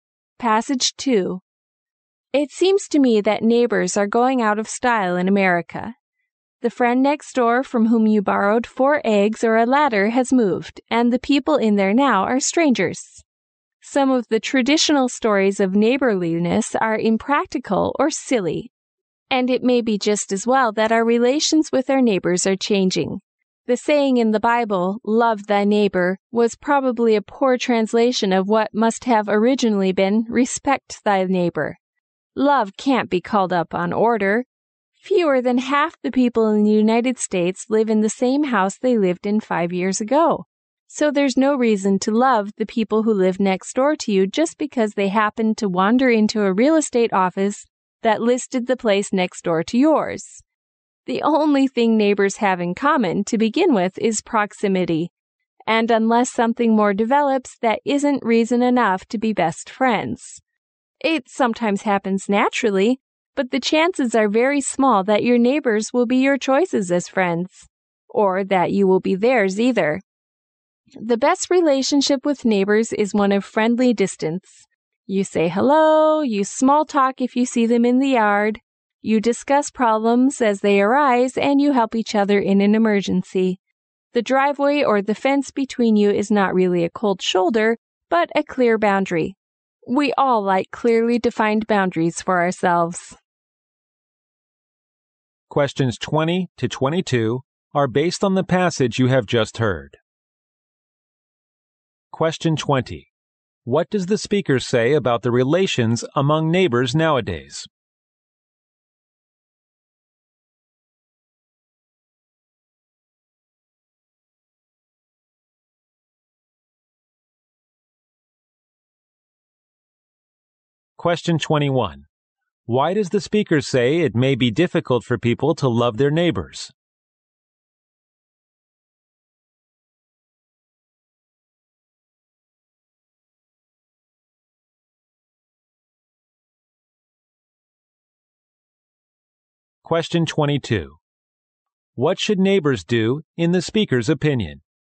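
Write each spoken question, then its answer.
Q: What does the speaker say about the relations among neighbors nowadays?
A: They are changing, and neighbors are often strangers now.

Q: Why does the speaker say it may be difficult for people to love their neighbors?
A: People move often, and neighbors have only proximity in common.

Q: What should neighbors do in the speaker's opinion?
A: Keep a friendly distance and help each other in an emergency.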